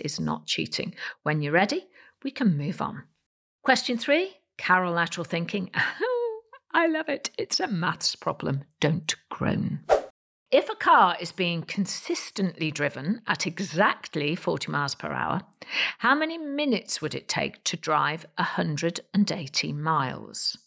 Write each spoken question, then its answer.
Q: If a car is being consistently driven at exactly 40 miles per hour, how many minutes would it take to drive 180 miles?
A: And the answer is 270 minutes.